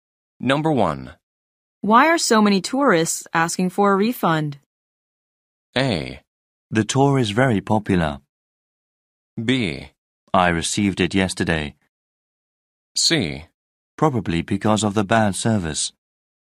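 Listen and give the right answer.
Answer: C: Probably because of the bad service.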